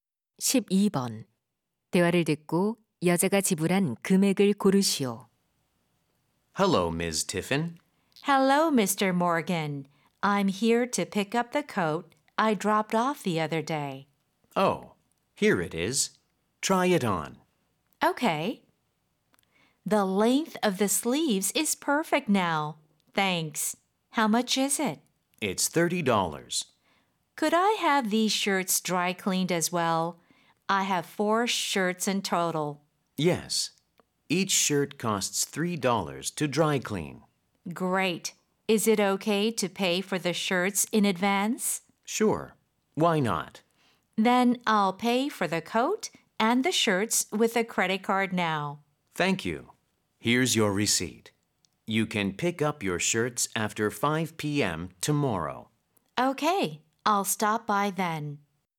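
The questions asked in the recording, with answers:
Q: 대화를 듣고 여자가 지불한 금액을 고르시오.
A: $42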